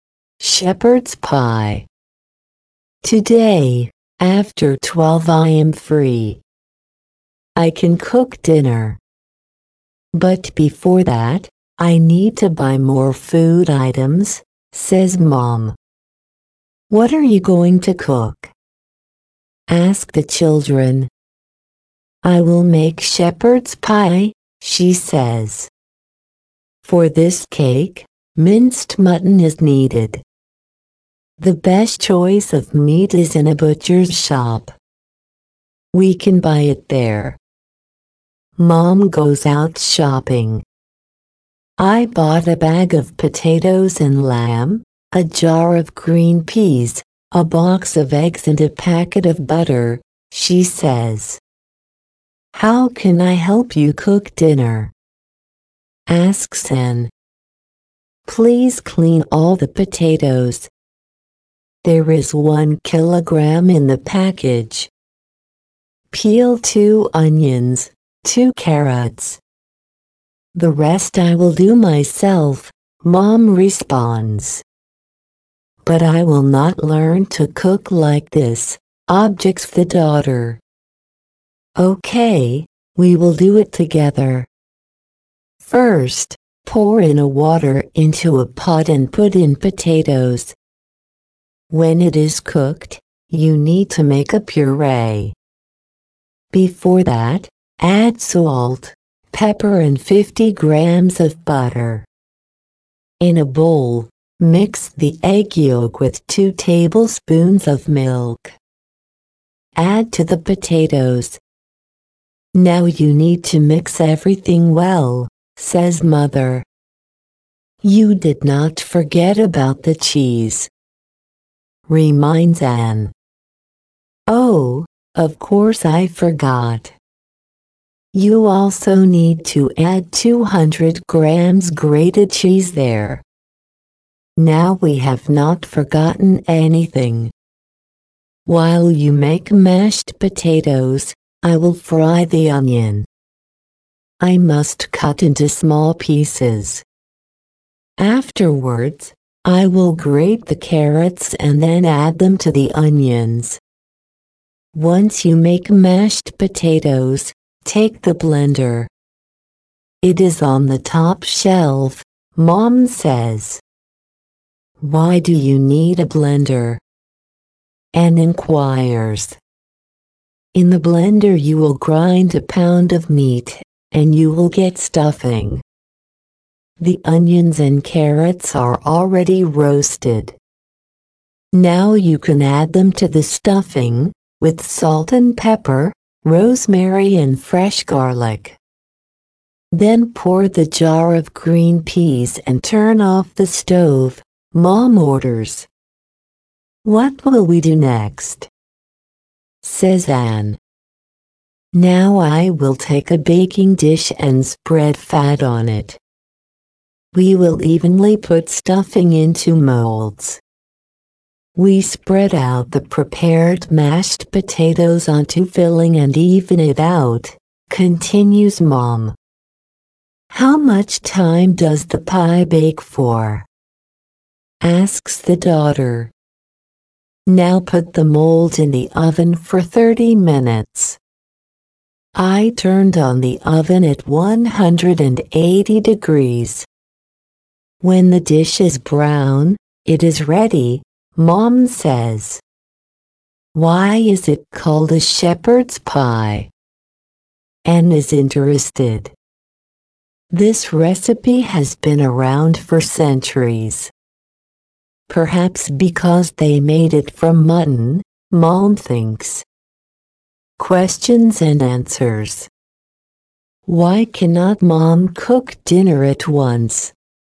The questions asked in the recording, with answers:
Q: Why cannot Mom cook dinner at once?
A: Because she needs to buy food first.